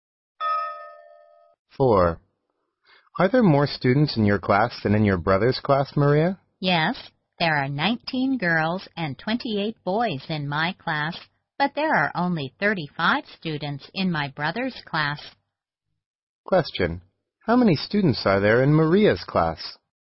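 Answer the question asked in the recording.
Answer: 47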